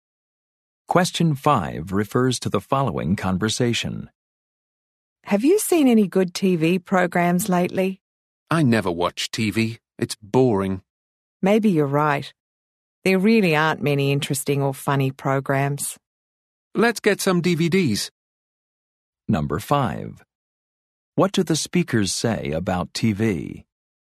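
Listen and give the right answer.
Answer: It's boring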